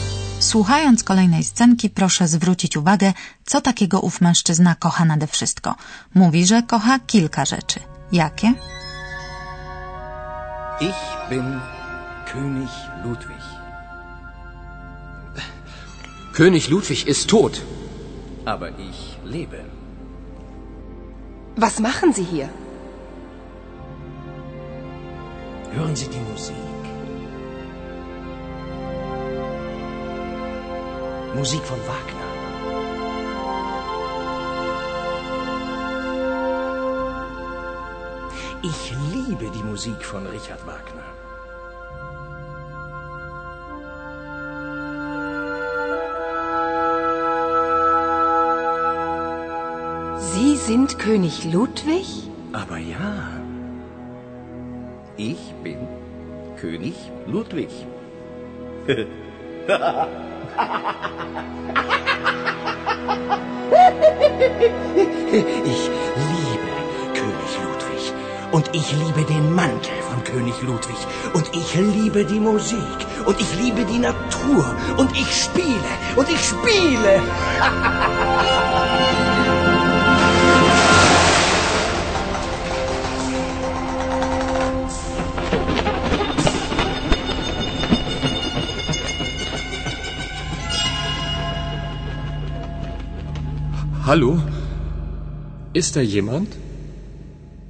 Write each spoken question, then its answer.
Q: Słuchając kolejnej scenki, proszę zwrócić uwagę, co takiego ów mężczyzna kocha nade wszystko. Mówi, że kocha kilka rzeczy. Jakie?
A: Na pewno udało się Państwu zrozumieć, że ten dziwny pan kocha muzykę, zwłaszcza muzykę skomponowaną przez Richarda Wagnera.